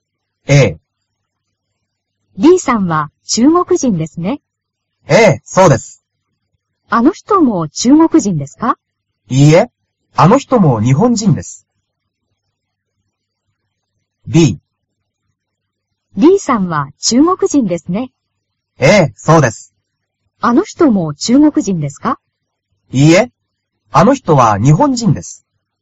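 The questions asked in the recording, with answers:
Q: あの人も中国人ですか?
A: B: いいえ、あの人は日本人です。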